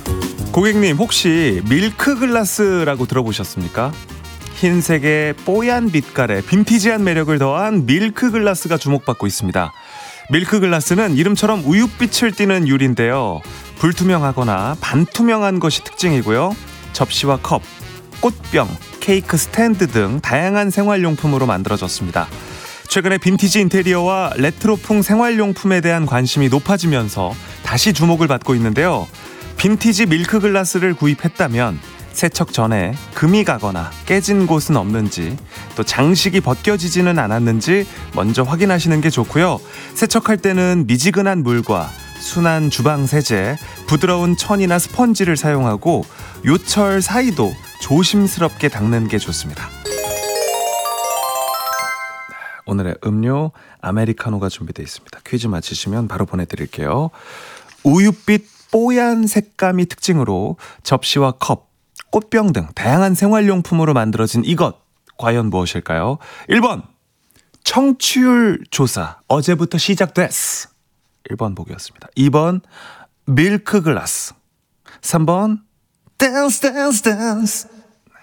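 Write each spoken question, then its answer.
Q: 우윳빛 뽀얀 색감이 특징으로 접시와 컵, 꽃병 등 다양한 생활용품으로 만들어진 이것, 과연 무엇일까요?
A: 2: 밀크글라스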